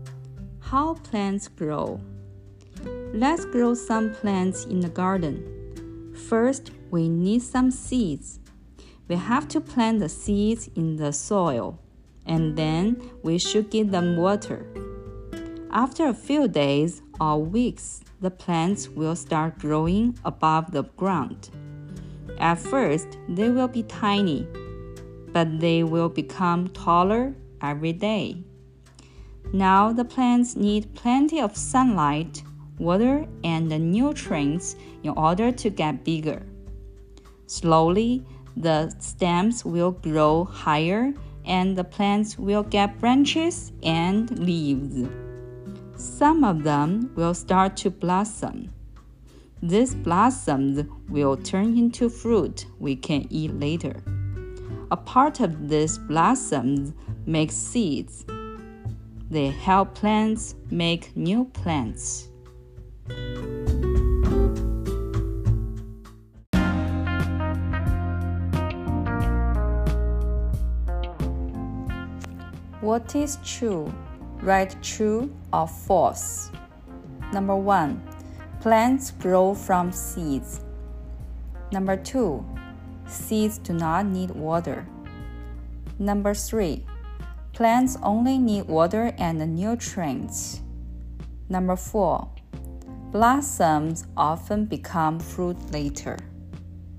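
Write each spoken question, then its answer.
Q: Plants grow from seeds.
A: True

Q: Seeds do not need water.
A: False

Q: Plants only need water and nutrients.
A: False

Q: Blossoms often become fruit later.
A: True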